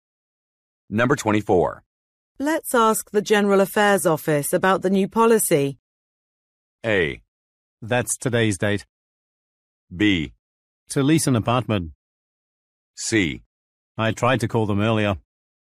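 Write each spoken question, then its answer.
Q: Let's ask the General Affairs Office about the new policy.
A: C: I tried to call them earlier.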